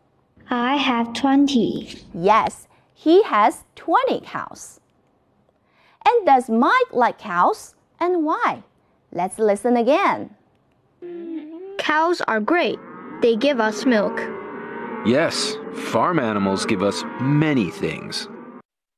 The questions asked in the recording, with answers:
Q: And does Mike like cows?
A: Mike likes cows.